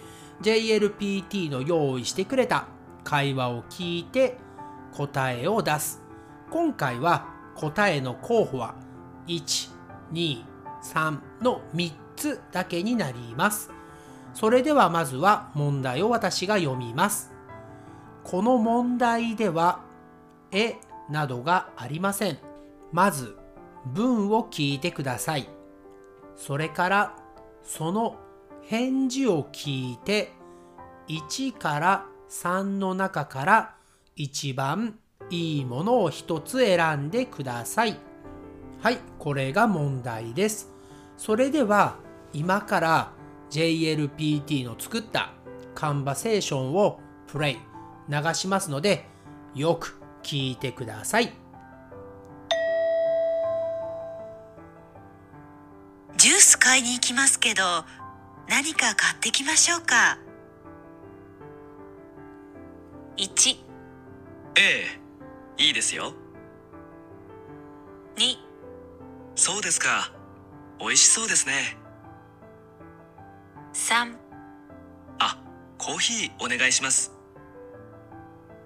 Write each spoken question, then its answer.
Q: 買いに行きますけど何か買ってきましょうか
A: 答えは3番のあ、コーヒーお願いします。